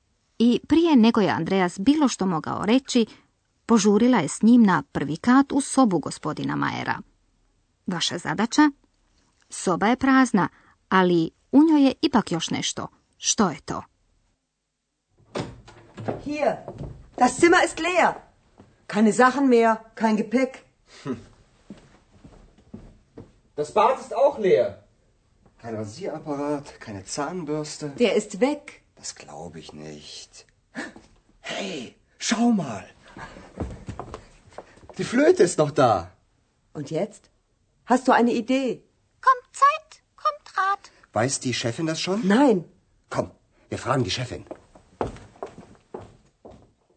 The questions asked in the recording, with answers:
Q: Vaša zadaća? Soba je prazna, ali u njoj je ipak još nešto.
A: Da, jedino što je još ostalo u praznoj sobi jest flauta gospodina Majera.